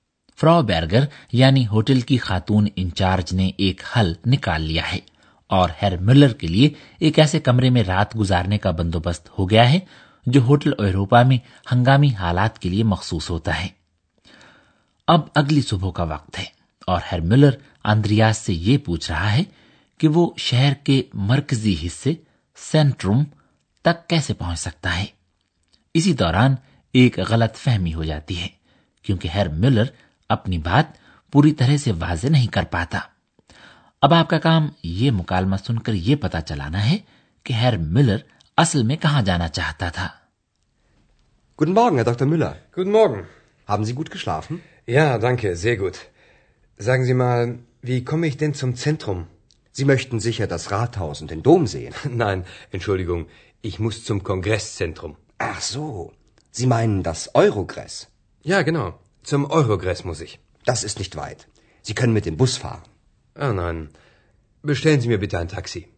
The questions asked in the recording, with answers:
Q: اب آپ کا کام یہ مکالمہ سن کر یہ پتا چلانا ہے کہ ہیر ملر اصل میں کہاں جانا چاہتا تھا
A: اصل میں ہیر ملر شہر کے centre یا مرکز میں نہیں بلکہ آخن کے کانگریس centre جانا چاہتا ہے